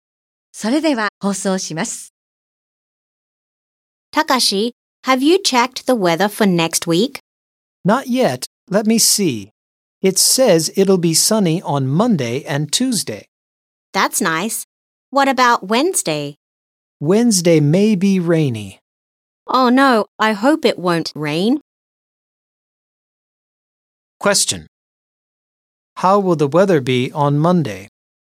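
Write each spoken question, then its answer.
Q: Question. How will the weather be on Monday?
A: It will be sunny.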